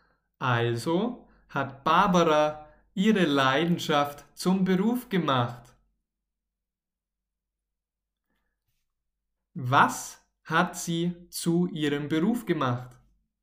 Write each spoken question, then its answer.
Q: Was hat sie zu ihrem Beruf gemacht?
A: Ihre Leidenschaft. Barbara hat ihre Leidenschaft zum Beruf gemacht.